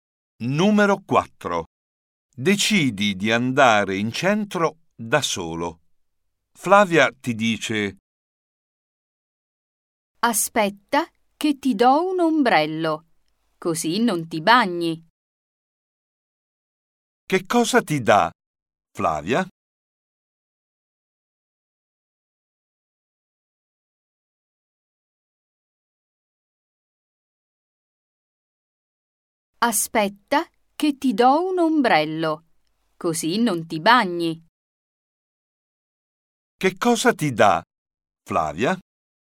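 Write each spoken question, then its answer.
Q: Che cosa ti dà, Flavia?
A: un ombrello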